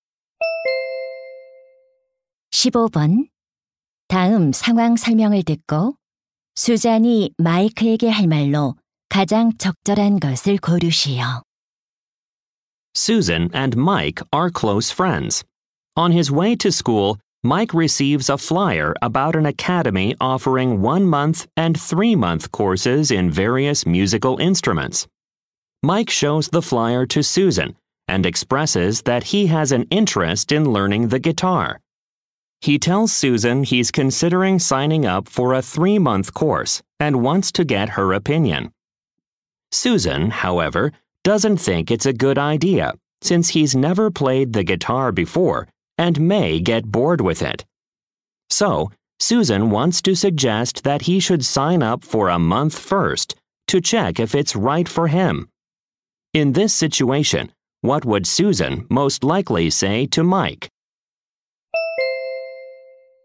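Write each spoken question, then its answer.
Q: 다음 상황 설명을 듣고 수잔이 마이크에게 할 말로 가장 적절한 것을 고르시오.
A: 먼저 한 달 과정에 등록해서 맞는지 확인해 보라고 제안하는 말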